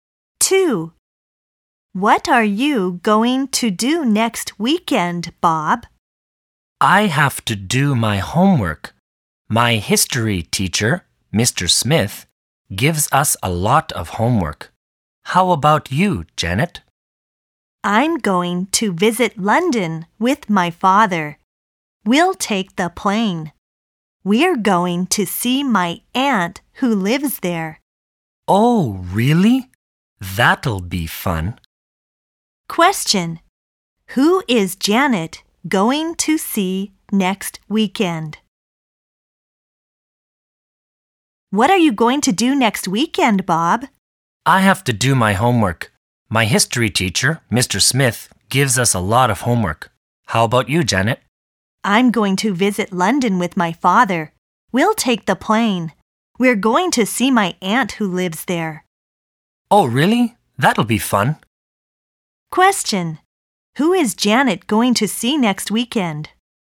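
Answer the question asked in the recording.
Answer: Her aunt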